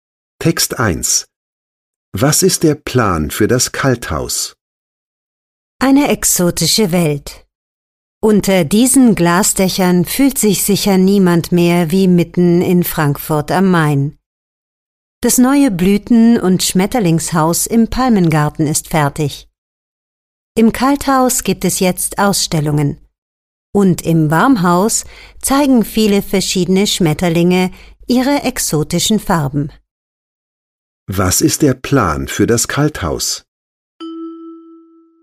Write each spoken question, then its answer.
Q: Was ist der Plan für das Kalthaus?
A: Das Kalthaus im Palmengarten ist ein Ort für Ausstellungen.